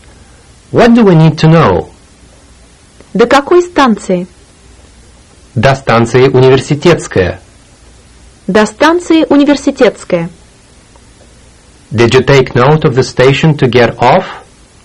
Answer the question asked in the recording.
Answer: That's right. Университетская.